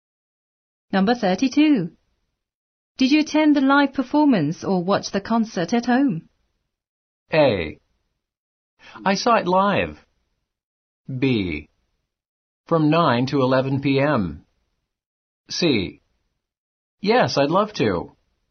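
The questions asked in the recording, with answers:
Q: Did you attend the live performance or watch the concert at home?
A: A: I saw it live.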